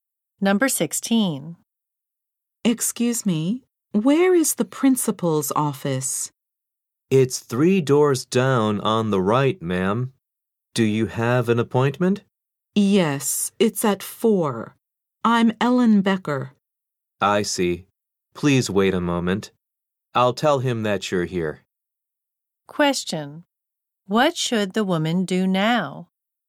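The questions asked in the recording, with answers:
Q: What should the woman do now?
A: Wait a moment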